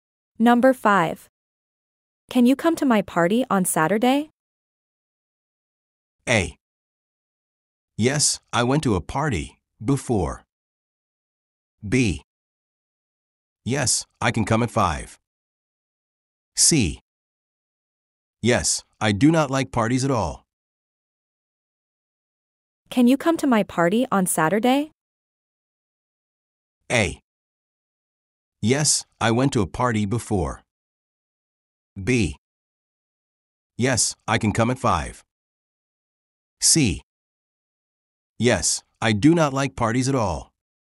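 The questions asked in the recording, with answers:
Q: Can you come to my party on Saturday?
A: B: Yes, I can come at 5.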